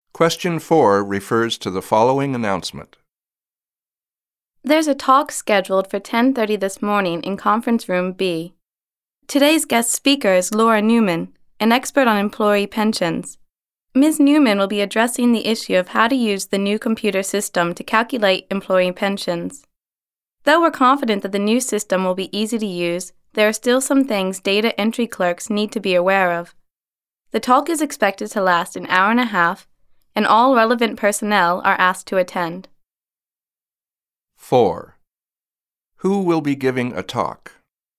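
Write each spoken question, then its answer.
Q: Who will be giving a talk?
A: Laura Newman, an expert on employee pensions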